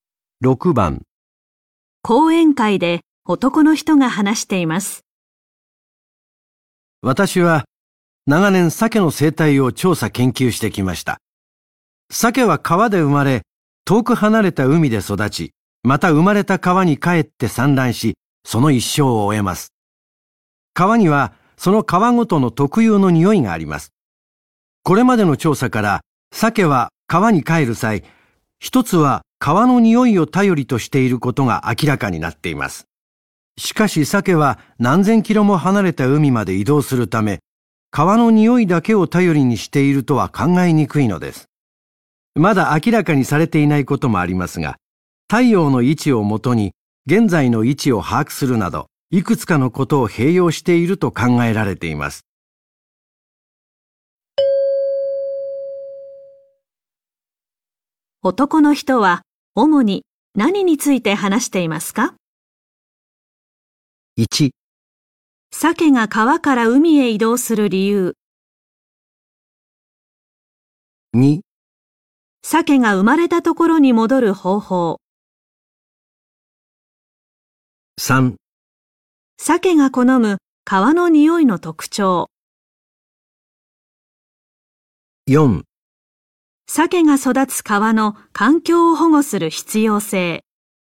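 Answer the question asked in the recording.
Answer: 2: 鮭が生まれたところに戻る方法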